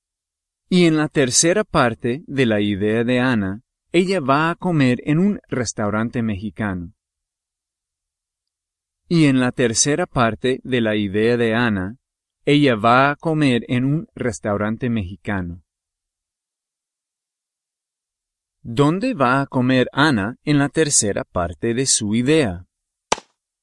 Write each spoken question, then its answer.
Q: ¿Dónde va a comer Ana en la tercera parte de su idea?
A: Un restaurante mexicano.